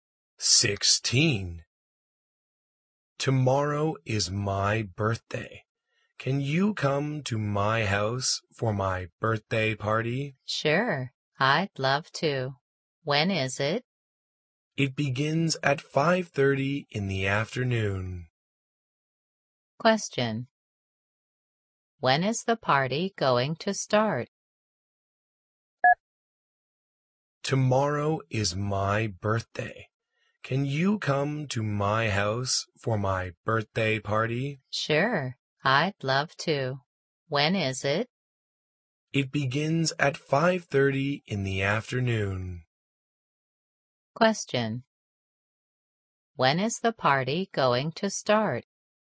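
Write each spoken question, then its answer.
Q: When is the party going to start?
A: At 5:30 in the afternoon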